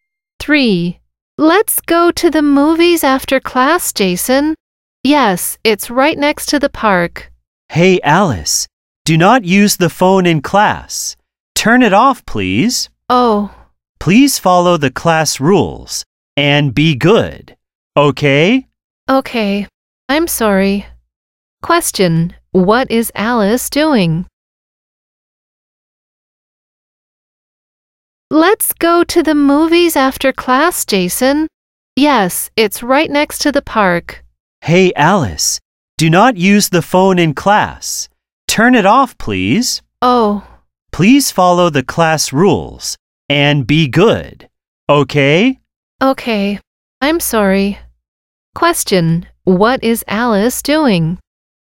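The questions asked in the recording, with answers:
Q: What is Alice doing?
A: Using her phone in class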